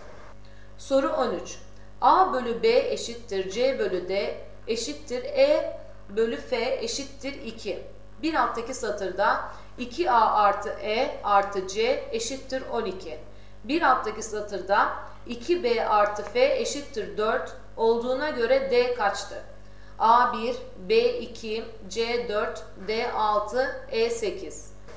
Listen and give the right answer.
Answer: Doğru cevap B2.